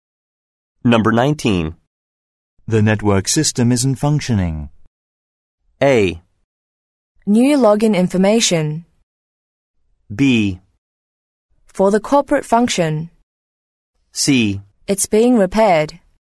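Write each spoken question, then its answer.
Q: The network system isn't functioning.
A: C: It's being repaired.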